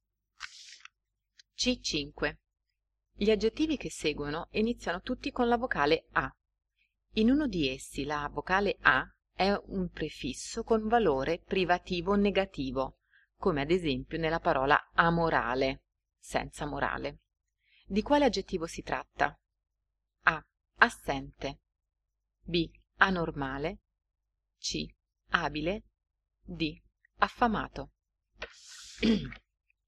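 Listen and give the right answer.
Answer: B: Anormale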